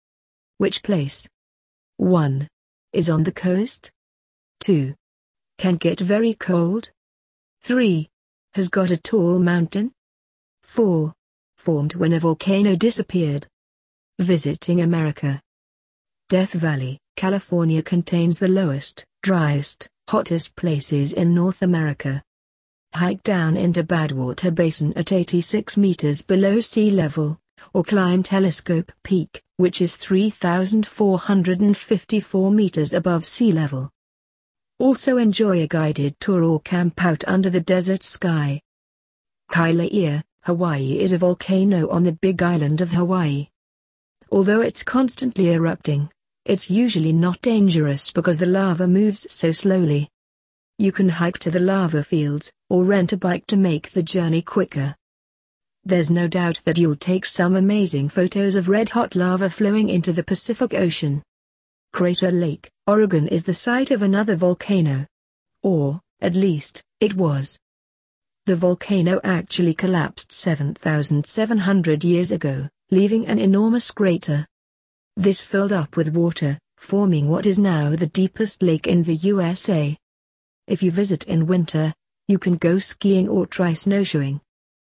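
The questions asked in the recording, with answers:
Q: Is on the coast?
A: Kailua, Hawaii

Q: Can get very cold?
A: Crater Lake, Oregon

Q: Has got a tall mountain?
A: Death Valley, California

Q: Formed when a volcano disappeared.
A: Crater Lake, Oregon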